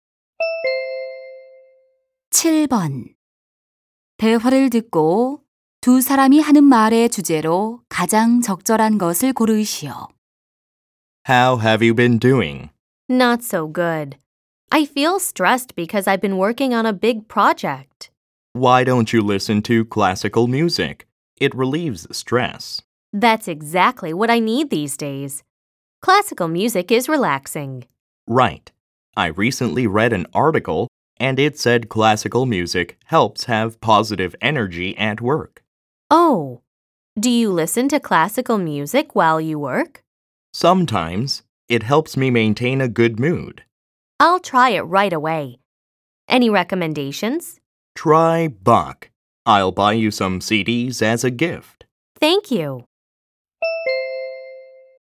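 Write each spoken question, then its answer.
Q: 대화를 듣고 두 사람이 하는 말의 주제로 가장 적절한 것을 고르시오.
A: 클래식 음악의 스트레스 해소 효과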